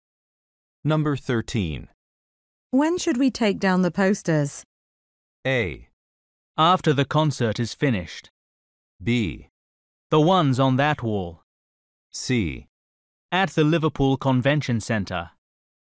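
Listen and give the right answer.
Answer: A: After the concert is finished.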